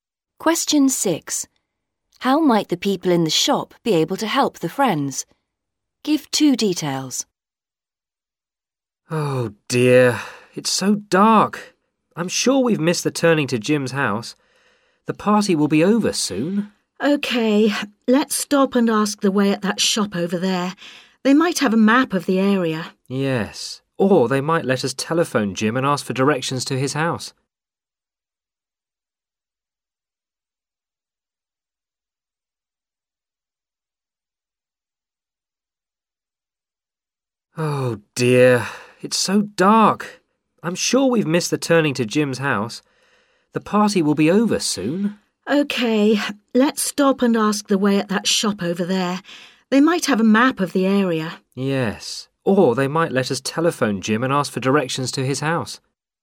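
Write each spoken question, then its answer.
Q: How might the people in the shop be able to help the friends?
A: They might have a map of the area; they might let them telephone Jim for directions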